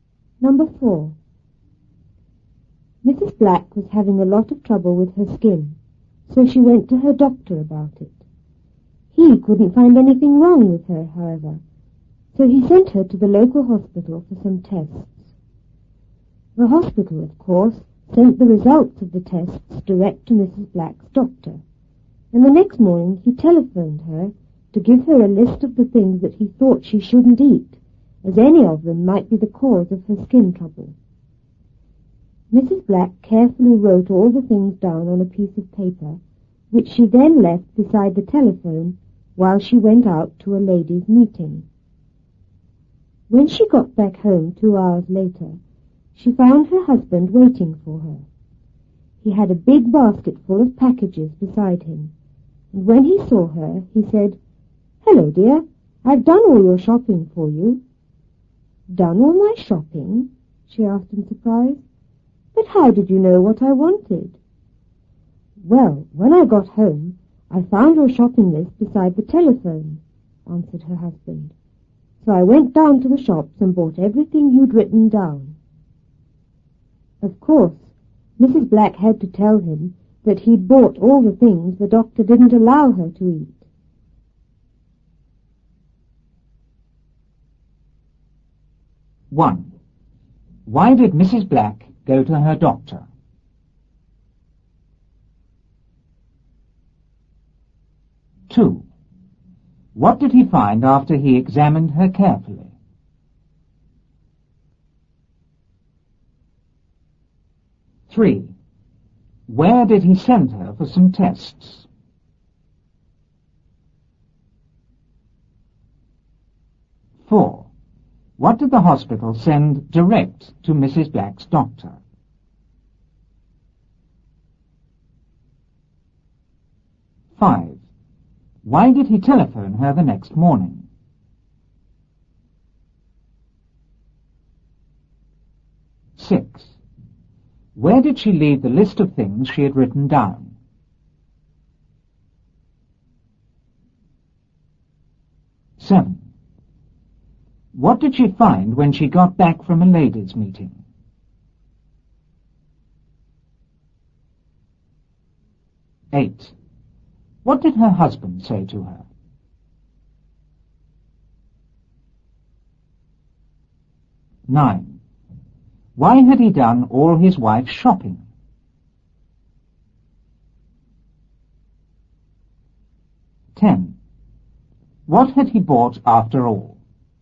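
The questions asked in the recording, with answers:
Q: Why did Mrs. Black go to her doctor?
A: Because she was having a lot of trouble with her skin

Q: What did he find after he examined her carefully?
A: He couldn't find anything wrong with her

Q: Where did he send her for some tests?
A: To the local hospital

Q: What did the hospital send direct to Mrs. Black's doctor?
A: The results of the tests

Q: Why did he telephone her the next morning?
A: To give her a list of the things she shouldn't eat

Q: Where did she leave the list of things she had written down?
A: Beside the telephone

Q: What did she find when she got back from a ladies' meeting?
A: Her husband waiting for her with a big basket full of packages

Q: What did her husband say to her?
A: "Hello, dear. I've done all your shopping for you."

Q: Why had he done all his wife's shopping?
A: He found what he thought was her shopping list beside the telephone

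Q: What had he bought after all?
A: All the things the doctor didn't allow her to eat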